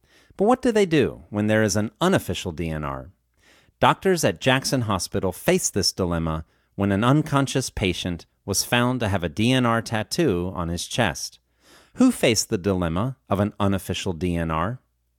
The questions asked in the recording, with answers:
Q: Who faced the dilemma of an unofficial DNR?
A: Doctors at Jackson Hospital faced the dilemma of an unofficial DNR.